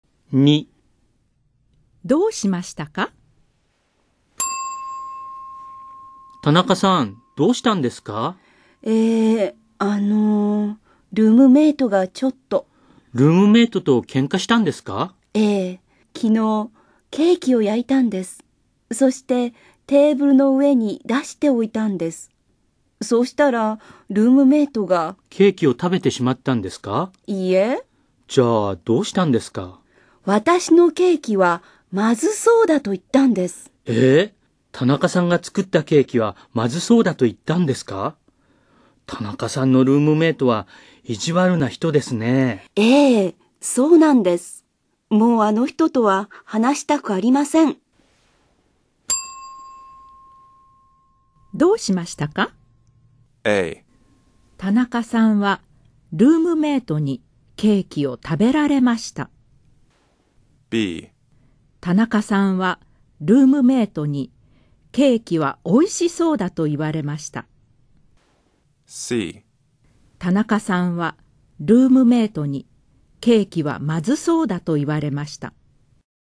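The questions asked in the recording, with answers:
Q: どうしましたか?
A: C: 田中さんはルームメイトにケーキはまずそうだと言われました。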